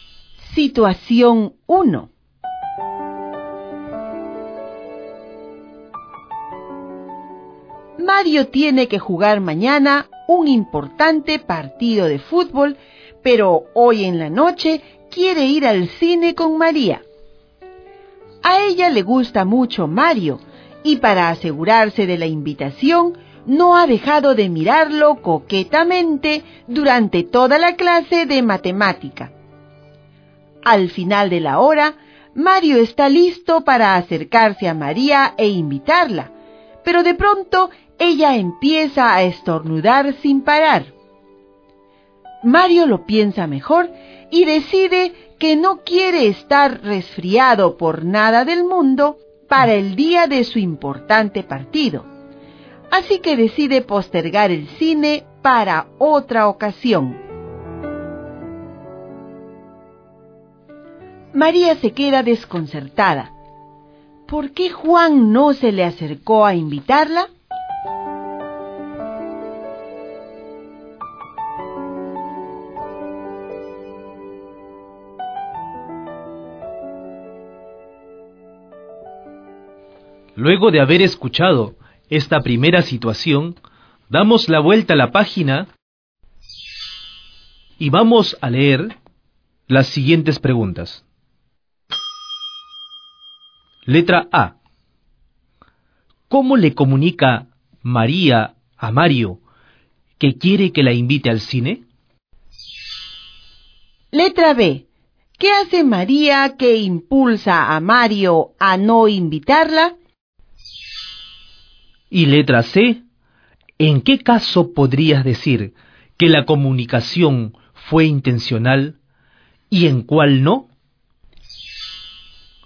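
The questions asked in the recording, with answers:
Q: ¿Por qué Juan no se le acercó a invitarla?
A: Porque ella empezó a estornudar y él no quería resfriarse antes de su partido

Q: ¿Cómo le comunica María a Mario que quiere que la invite al cine?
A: Mirándolo coquetamente durante toda la clase

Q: ¿Qué hace María que impulsa a Mario a no invitarla?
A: Empieza a estornudar sin parar

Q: ¿En qué caso podrías decir que la comunicación fue intencional y en cuál no?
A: Las miradas coquetas fueron intencionales; los estornudos no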